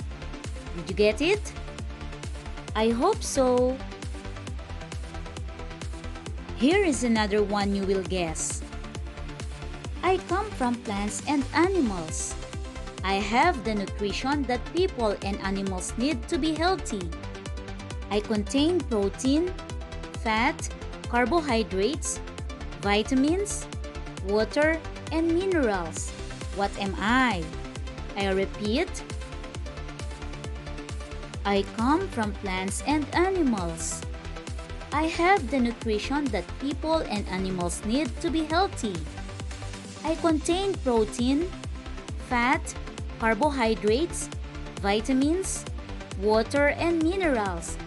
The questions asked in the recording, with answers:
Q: What am I?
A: The answer is food.